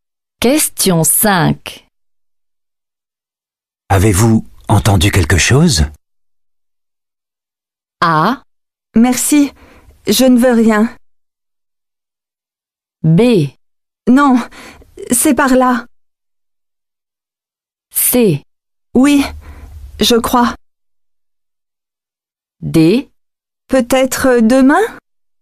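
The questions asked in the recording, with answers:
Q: Avez-vous entendu quelque chose?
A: C: Oui, je crois.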